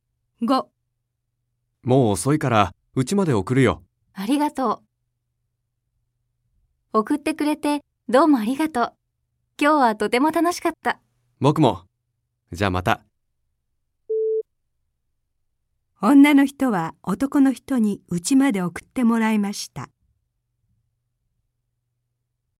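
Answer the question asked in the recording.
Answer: 正しい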